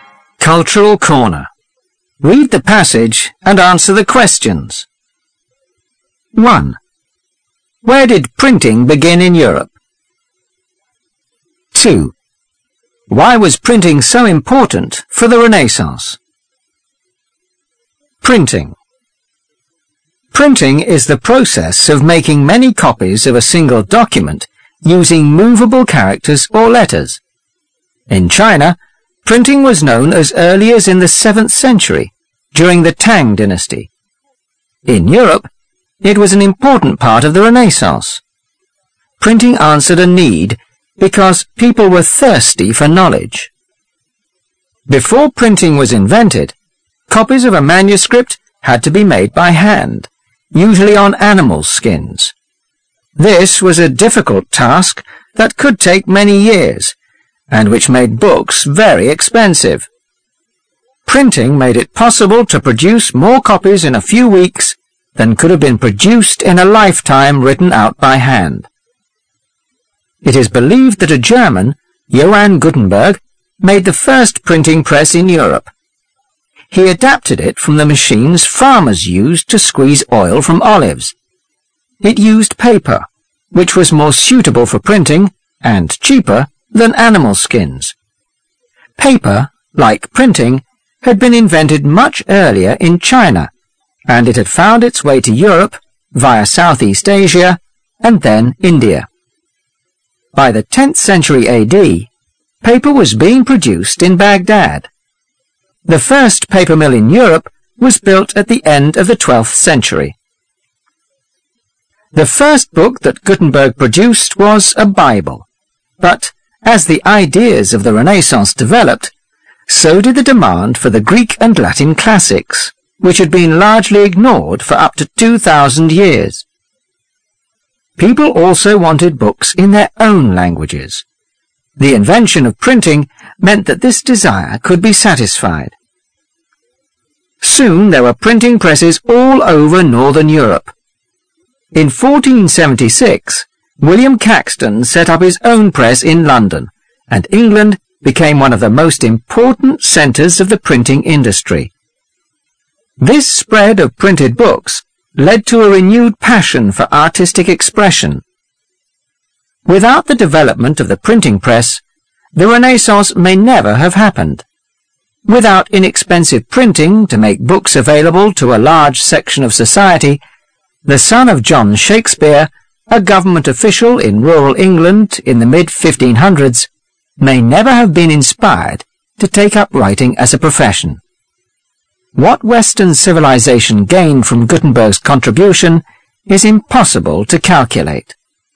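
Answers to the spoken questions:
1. In Germany (Johann Gutenberg built the first printing press in Europe)
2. People were thirsty for knowledge, and printing made books cheap and widely available, including the classics and books in their own languages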